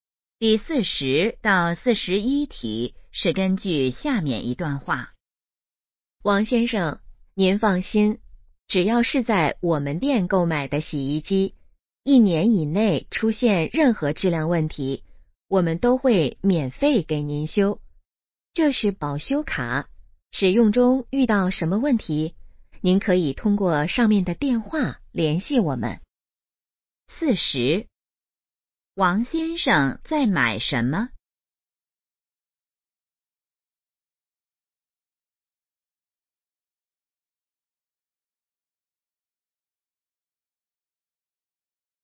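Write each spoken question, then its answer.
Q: 王先生在买什么?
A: 洗衣机

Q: 联系电话写在哪儿?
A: 保修卡上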